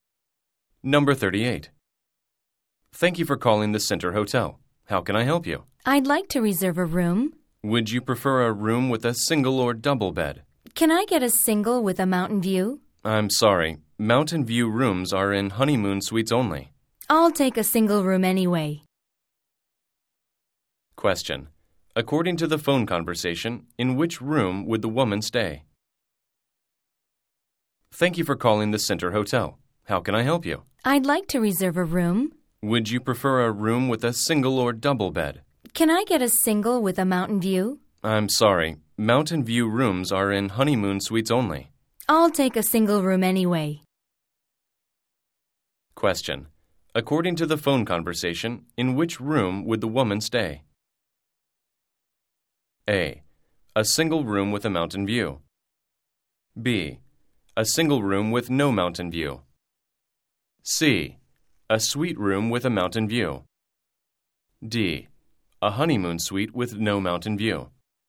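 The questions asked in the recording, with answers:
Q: According to the phone conversation, in which room would the woman stay?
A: B: A single room with no mountain view.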